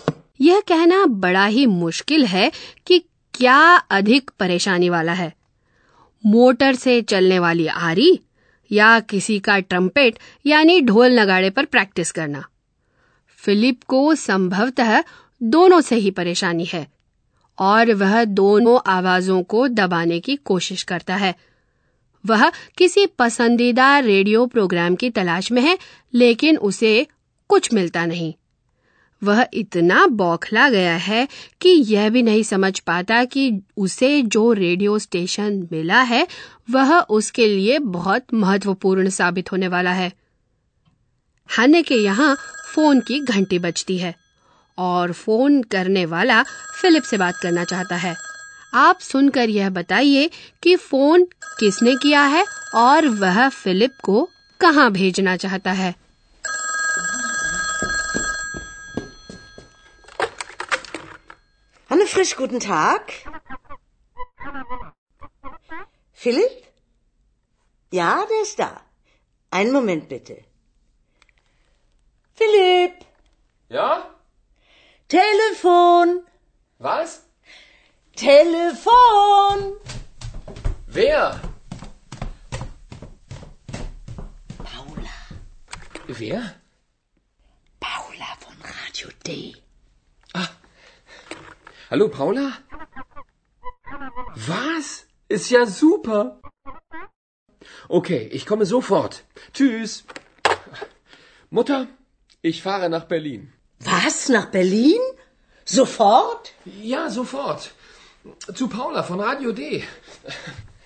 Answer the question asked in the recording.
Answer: Paula नाम की एक औरत का फोन है और वह गाडियो डे नाम के प्रसारण केंद्र में काम करती है वह चाहती है कि Philip Berlin आ जाए